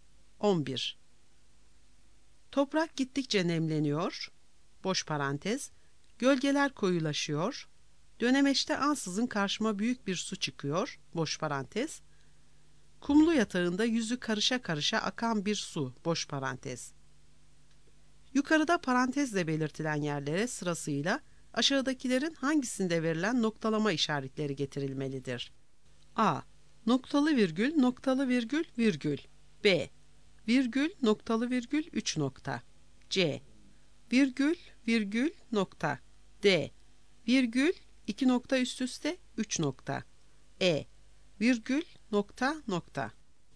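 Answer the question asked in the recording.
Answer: D: Virgül, iki nokta üst üste, üç nokta.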